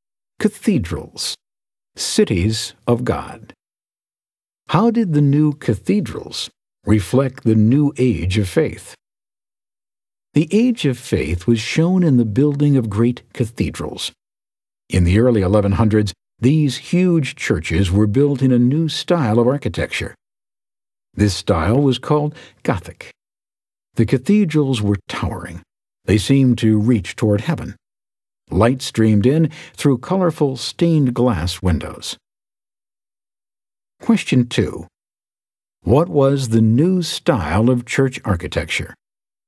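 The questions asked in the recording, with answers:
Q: What was the new style of church architecture?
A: Gothic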